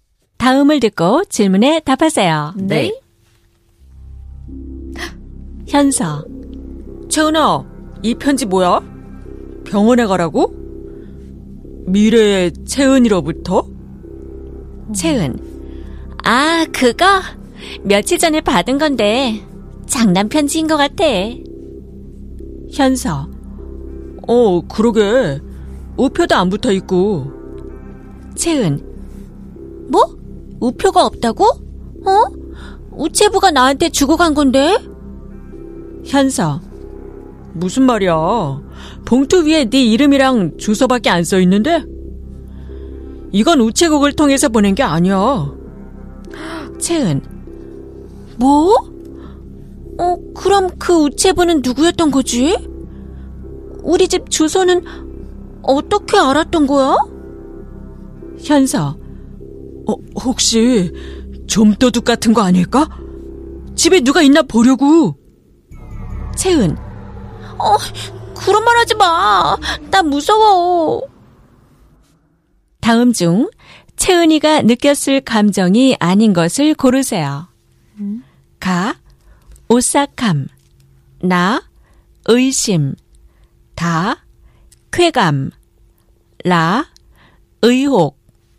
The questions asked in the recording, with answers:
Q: 다음 중 채은이가 느꼈을 감정이 아닌 것을 고르세요.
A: So we picked 다, which is 쾌감, which means